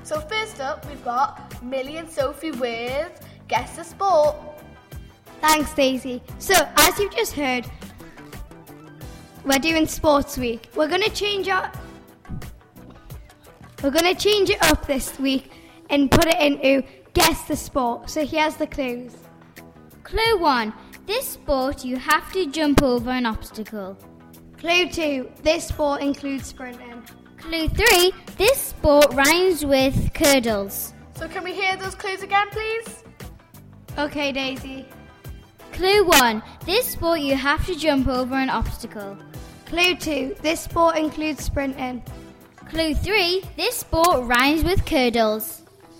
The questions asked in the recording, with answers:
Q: Clue 1. This sport, you have to jump over an obstacle.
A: We also knew that you'd been learning about hurdles